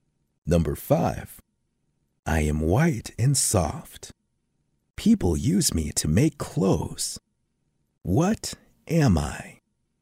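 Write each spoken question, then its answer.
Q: What am I?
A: cotton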